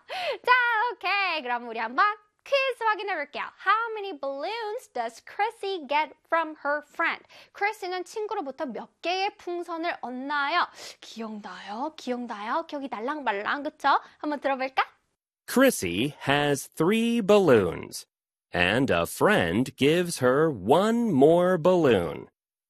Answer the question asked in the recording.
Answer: And a friend gives her one more balloon이니까 정답은 one이지요.